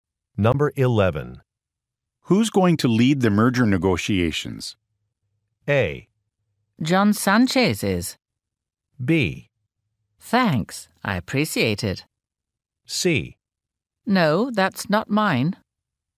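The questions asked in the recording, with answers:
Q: Who's going to lead the merger negotiations?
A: A: John Sanchez is.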